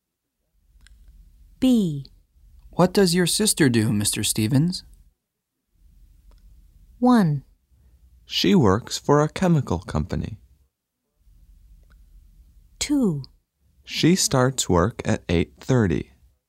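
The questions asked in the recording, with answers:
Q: What does your sister do, Mr. Stevens?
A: 1: She works for a chemical company.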